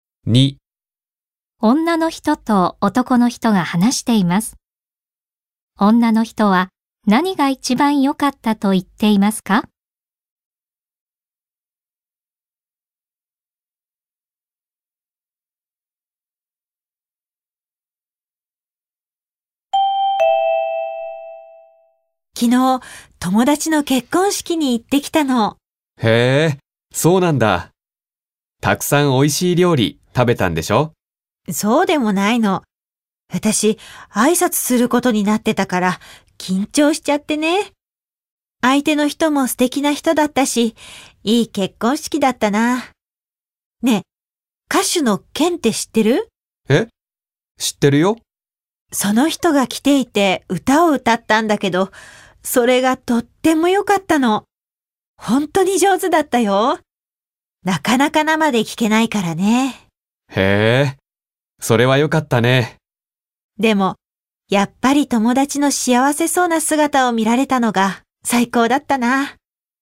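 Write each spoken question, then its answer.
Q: 女の人は何が一番良かったと言っていますか?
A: 友達の幸せそうな姿を見られたこと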